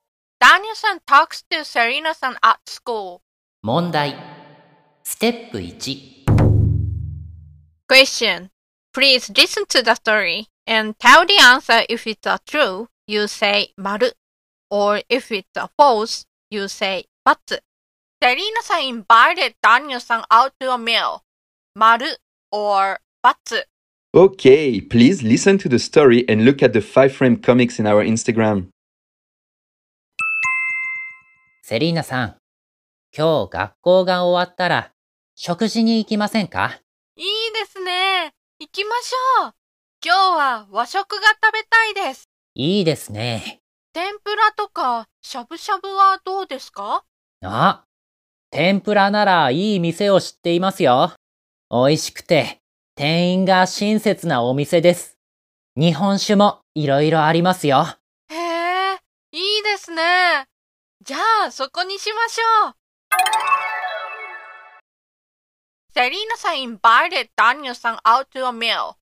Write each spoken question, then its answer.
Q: Serena-san invited Daniel-san out to a meal.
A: Okay, then the answer is but Daniel s invited Selena さん。